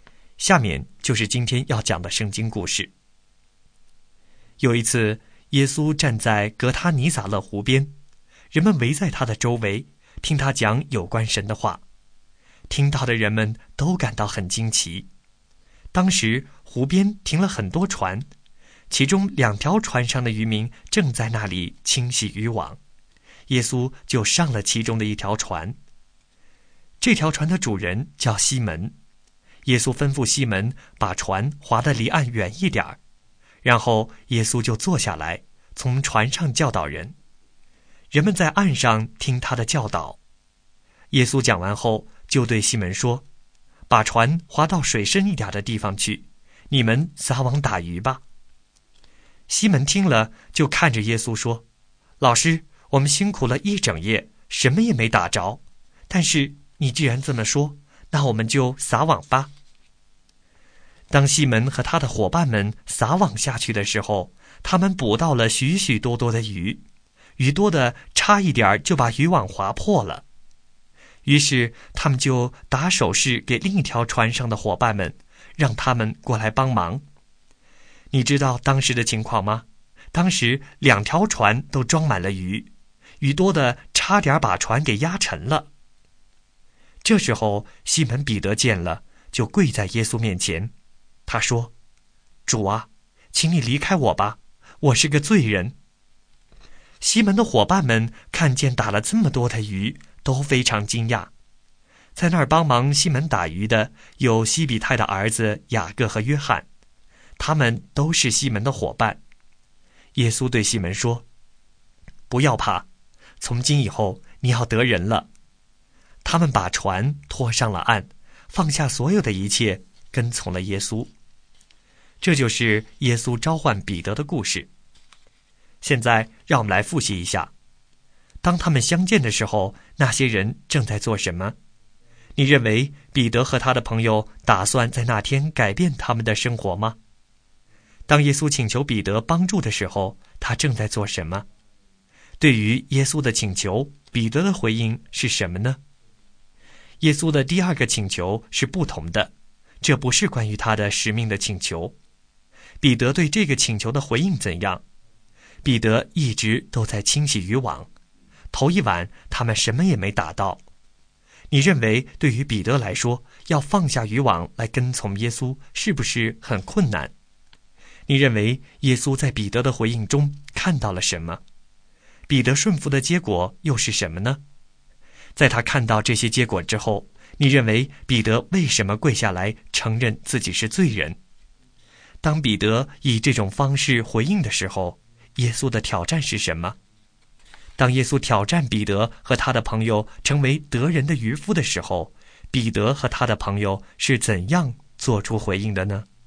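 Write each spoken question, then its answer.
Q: 当他们相见的时候,那些人正在做什么?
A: 渔民正在清洗渔网

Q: 当耶稣请求彼得帮助的时候,他正在做什么?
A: 在清洗渔网

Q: 对于耶稣的请求,彼得的回应是什么呢?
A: 他把船划得离岸远一点

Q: 彼得对这个请求的回应怎样?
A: 虽然一整夜什么也没打着,他还是照耶稣的话撒网

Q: 彼得顺服的结果又是什么呢?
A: 捕到许许多多的鱼,两条船都装满了

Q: 当彼得以这种方式回应的时候,耶稣的挑战是什么?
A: 不要怕,从今以后你要得人了

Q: 当耶稣挑战彼得和他的朋友成为得人的渔夫的时候,彼得和他的朋友是怎样做出回应的呢?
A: 把船拖上岸,放下所有的一切跟从了耶稣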